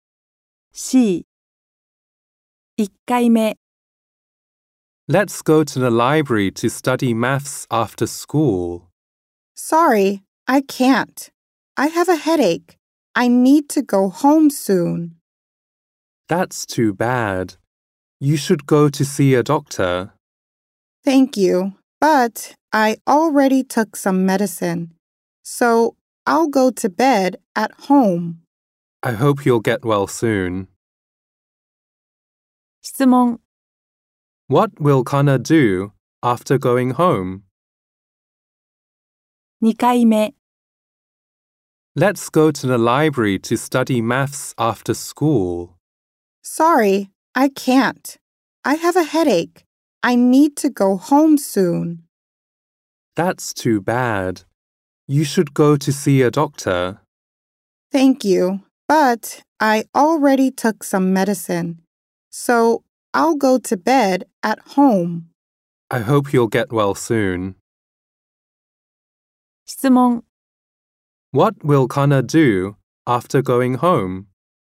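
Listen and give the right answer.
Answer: She will go to bed.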